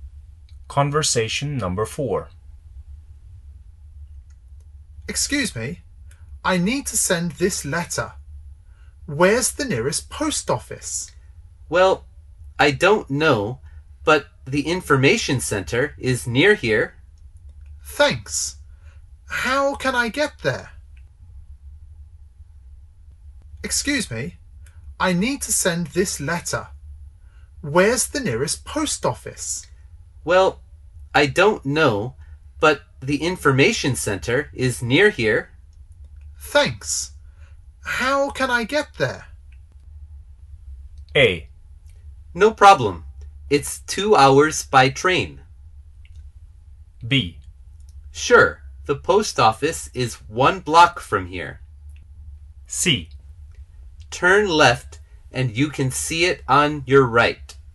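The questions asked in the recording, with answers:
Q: Thanks. How can I get there?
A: C: Turn left and you can see it on your right.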